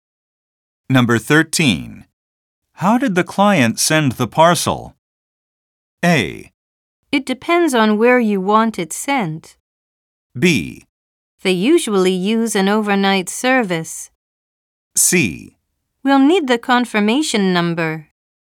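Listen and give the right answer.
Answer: B: They usually use an overnight service.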